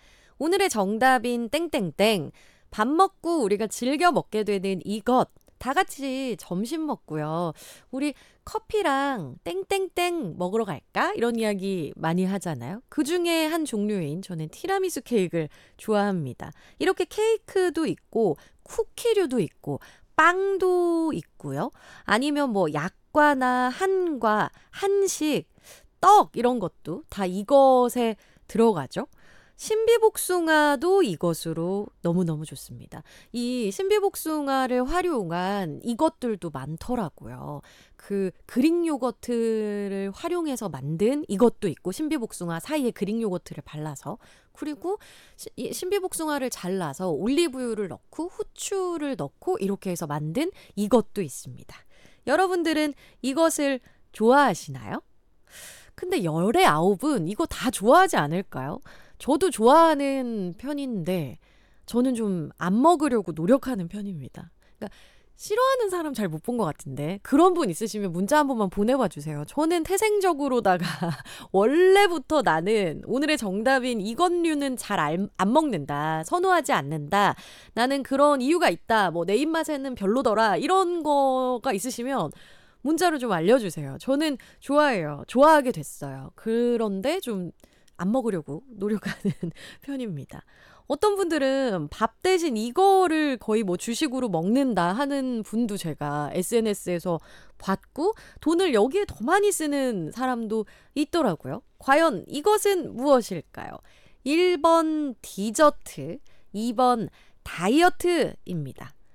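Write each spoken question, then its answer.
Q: 과연 이것은 무엇일까요? 1번 디저트, 2번 다이어트입니다.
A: 1: 디저트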